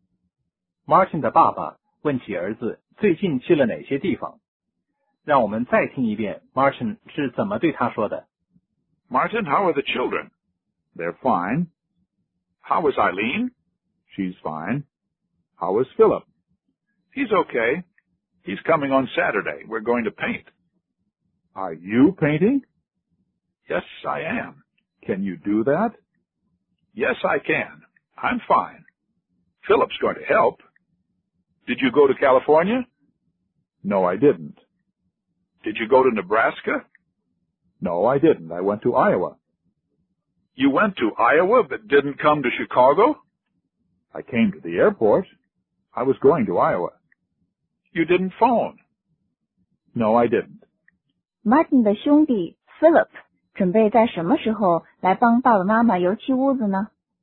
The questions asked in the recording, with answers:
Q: Martin 的兄弟 Philip 准备在什么时候来帮爸爸妈妈油漆屋子呢?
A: 他将在星期六来帮忙。